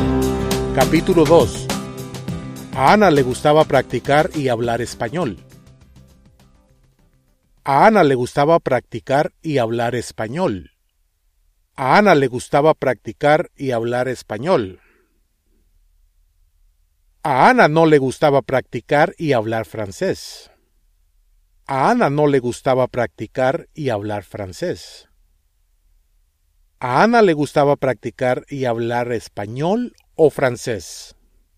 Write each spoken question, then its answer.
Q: A Ana le gustaba practicar y hablar español o francés.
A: El español.